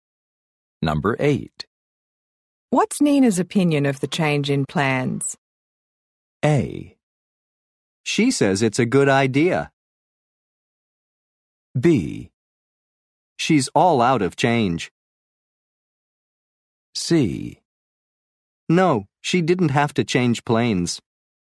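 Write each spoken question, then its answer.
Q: What's Nina's opinion of the change in plans?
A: A: She says it's a good idea.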